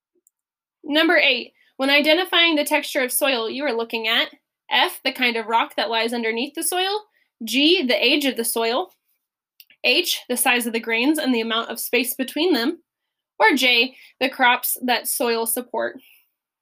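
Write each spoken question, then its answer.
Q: when identifying the texture of soil, you are looking at F, the kind of rock that lies underneath the soil, G, the age of the soil, H, the size of the grains and the amount of space between them, or J, the crops that soil support.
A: H: the size of the grains and the amount of space between them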